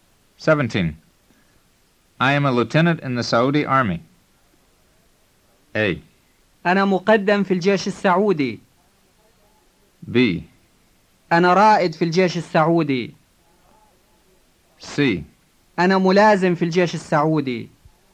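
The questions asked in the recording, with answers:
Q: I am a lieutenant in the Saudi Army.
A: C: أنا ملازم في الجيش السعودي.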